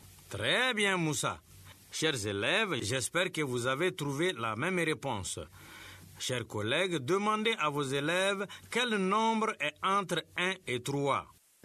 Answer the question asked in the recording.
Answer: Monsieur, c'est 2.